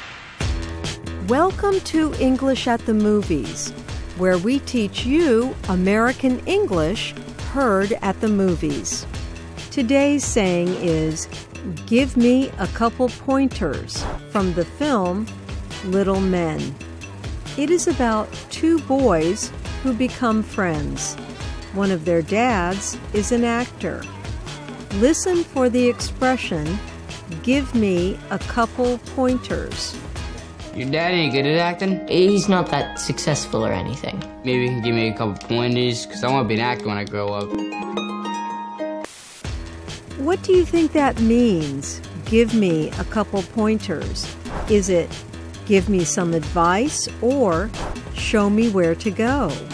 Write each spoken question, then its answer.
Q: What do you think that means, give me a couple pointers?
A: Give me a couple pointers means give me some advice.